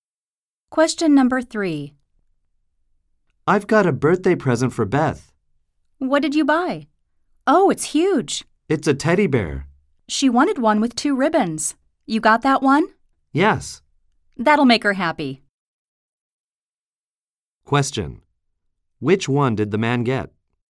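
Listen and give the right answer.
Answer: A huge teddy bear with two ribbons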